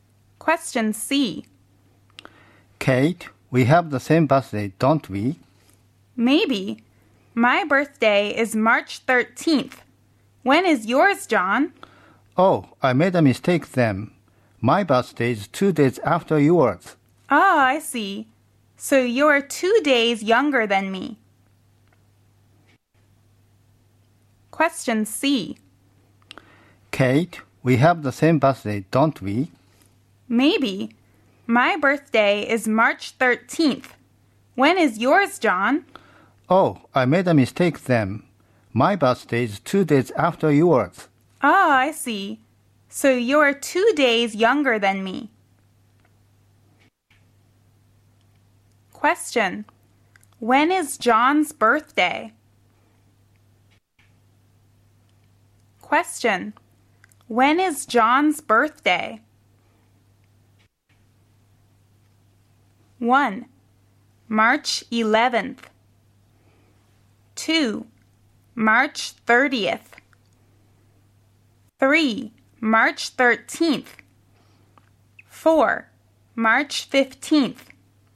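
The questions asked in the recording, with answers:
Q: When is John's birthday?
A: 4: March 15th.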